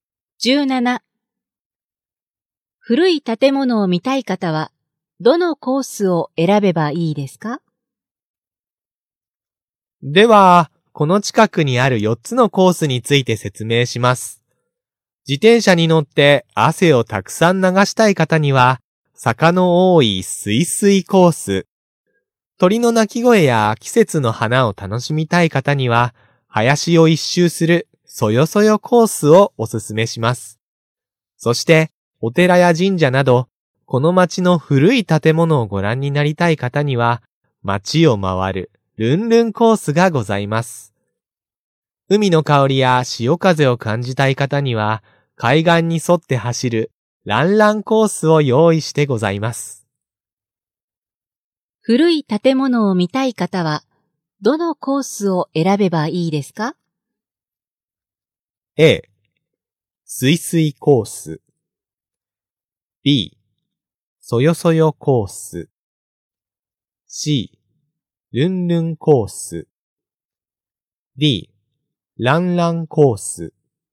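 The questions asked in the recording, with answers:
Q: 古い建物を見たい方は、どのコースを選べばいいですか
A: C: ルンルンコース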